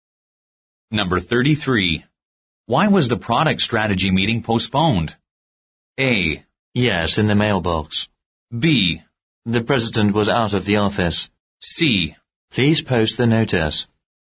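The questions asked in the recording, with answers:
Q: Why was the product strategy meeting postponed?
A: B: The president was out of the office.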